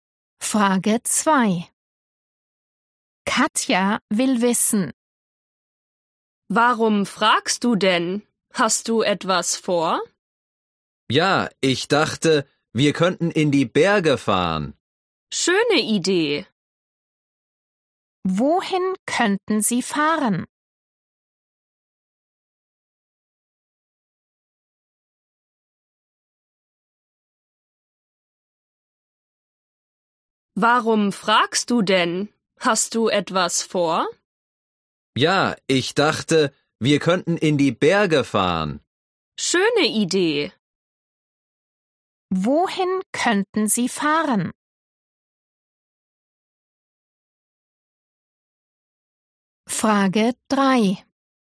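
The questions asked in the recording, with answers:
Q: Wohin könnten Sie fahren?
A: In die Berge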